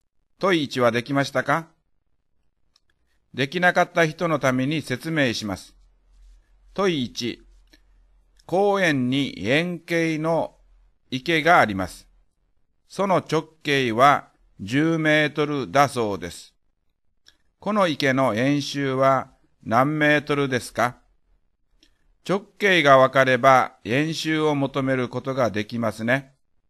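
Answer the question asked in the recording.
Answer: 31.4メートル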